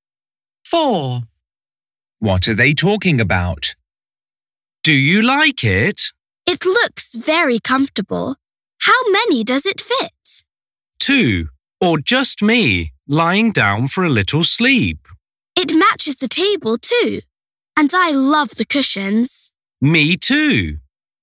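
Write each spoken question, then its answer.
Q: What are they talking about?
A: A sofa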